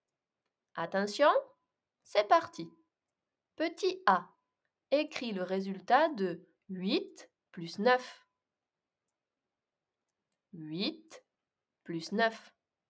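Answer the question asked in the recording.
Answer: 17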